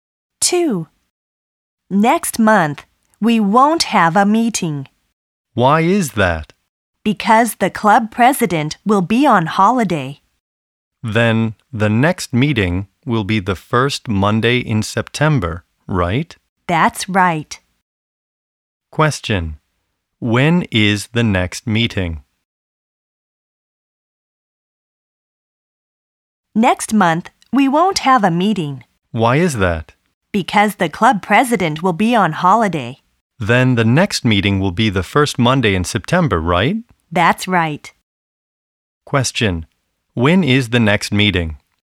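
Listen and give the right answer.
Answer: The first Monday in September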